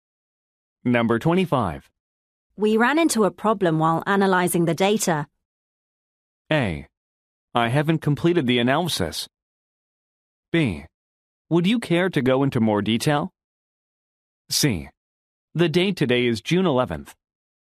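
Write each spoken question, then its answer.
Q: We ran into a problem while analyzing the data.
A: B: Would you care to go into more detail?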